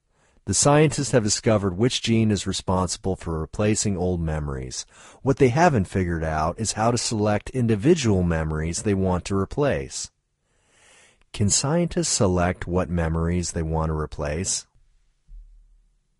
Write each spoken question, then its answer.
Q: Can scientists select what memories they want to replace?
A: No, scientists can't select what memories they want to replace.